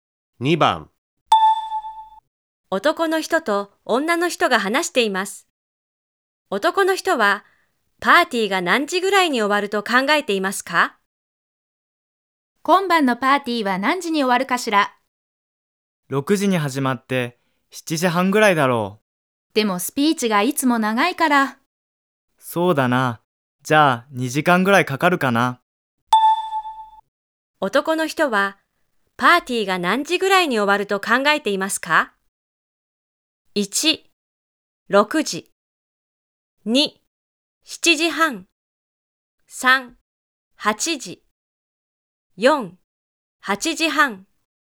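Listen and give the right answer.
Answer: 3: 8時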